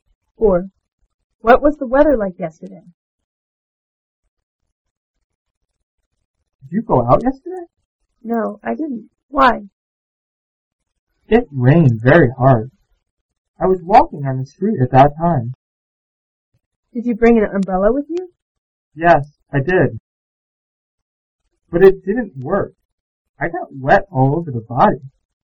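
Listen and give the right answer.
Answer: It rained very hard.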